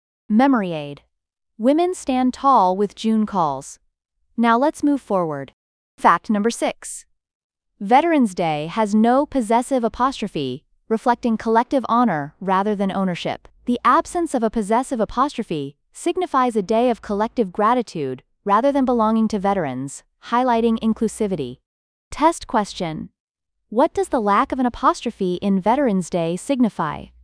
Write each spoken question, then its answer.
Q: What does the lack of an apostrophe in Veterans Day signify?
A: Collective honor.